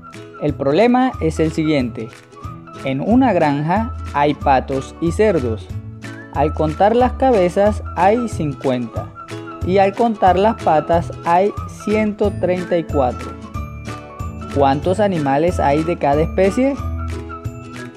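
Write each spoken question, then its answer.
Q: ¿Cuántos animales hay de cada especie?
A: 33 patos y 17 cerdos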